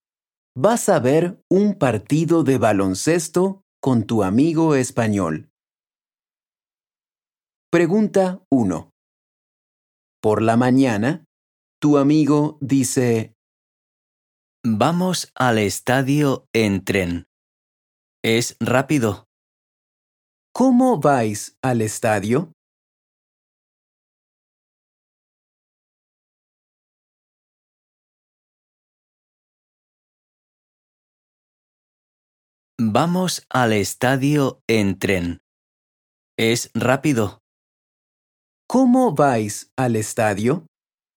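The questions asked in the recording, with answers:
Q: ¿Cómo vais al estadio?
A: En tren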